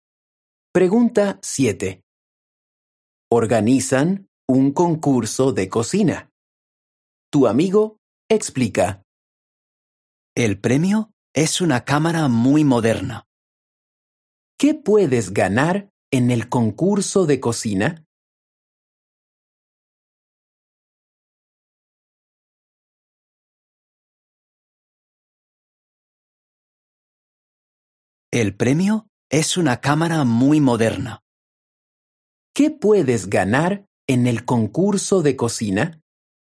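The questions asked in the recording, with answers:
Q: ¿Qué puedes ganar en el concurso de cocina?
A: Una cámara muy moderna.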